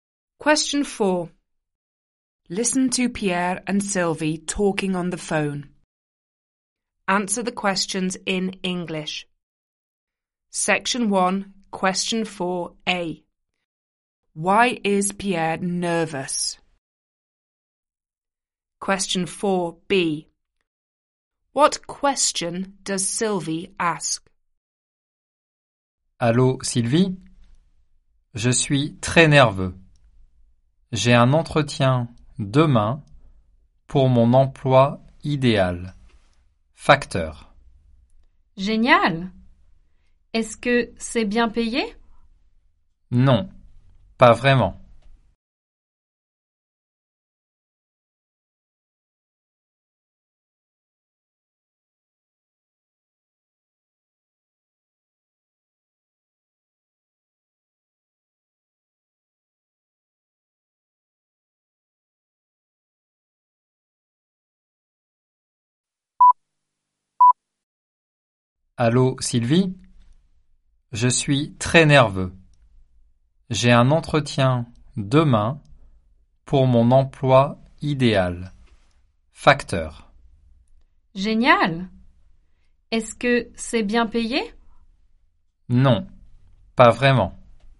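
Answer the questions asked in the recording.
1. He has an interview tomorrow for his ideal job (postman)
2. Is it well paid?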